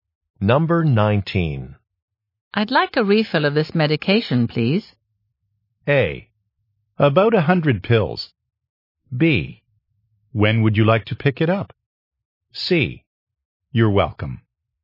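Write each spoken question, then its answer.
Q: I'd like a refill of this medication, please.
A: B: When would you like to pick it up?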